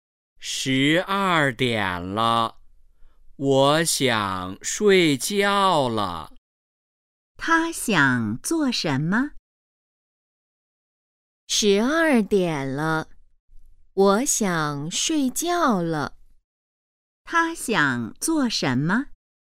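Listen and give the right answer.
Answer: 睡觉

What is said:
十二点了,我想睡觉了。
问:他想做什么?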